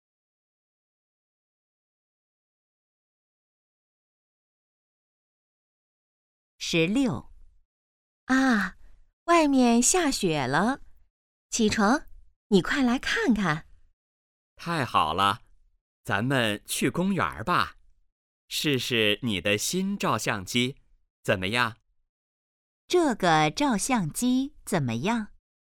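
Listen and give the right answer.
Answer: 是新的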